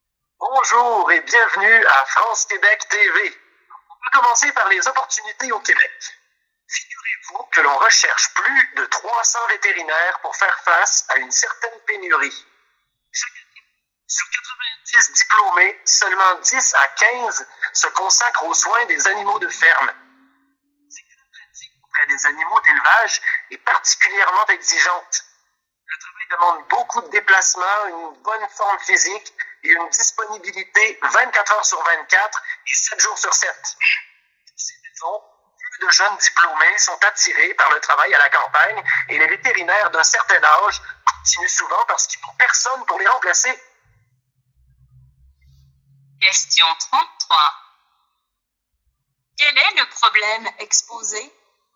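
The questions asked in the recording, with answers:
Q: Quel est le problème exposé?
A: Une pénurie de vétérinaires pour les animaux de ferme au Québec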